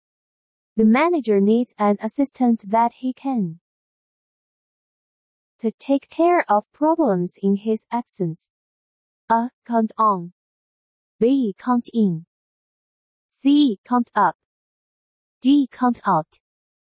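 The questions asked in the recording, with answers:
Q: The manager needs an assistant that he can to take care of problems in his absence.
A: A: Count on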